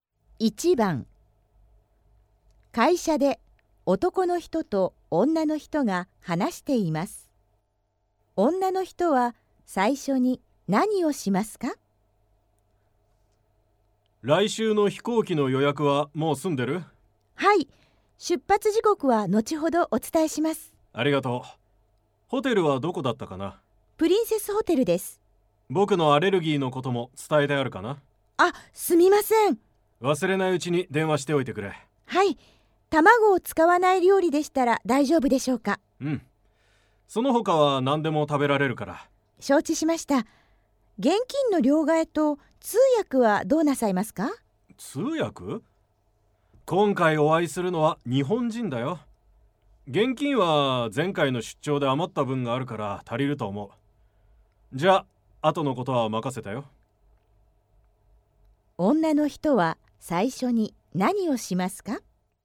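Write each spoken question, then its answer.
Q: 女の人は最初に何をしますか?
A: ホテルに電話して、男の人のアレルギー(卵)のことを伝える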